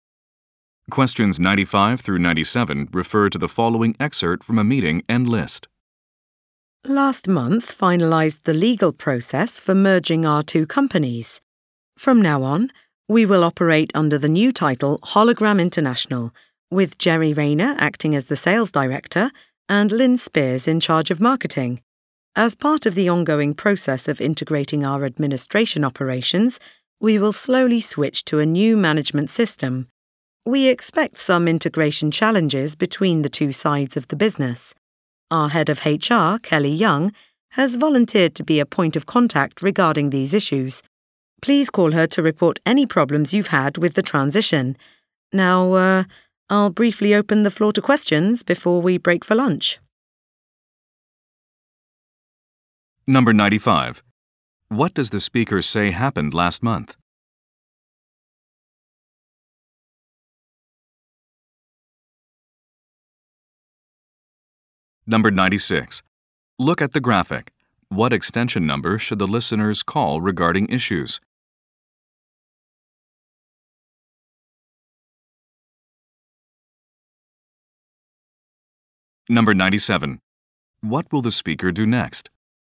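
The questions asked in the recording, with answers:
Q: What does the speaker say happened last month?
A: The merger of the two companies was finalized

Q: What will the speaker do next?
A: Take questions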